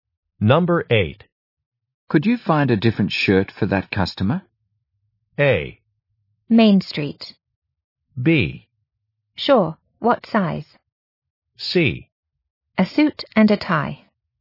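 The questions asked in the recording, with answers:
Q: Could you find a different shirt for that customer?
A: B: Sure, what size?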